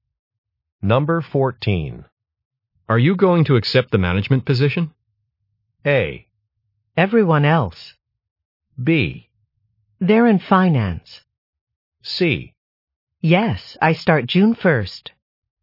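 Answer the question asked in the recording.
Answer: C: Yes, I start June 1st.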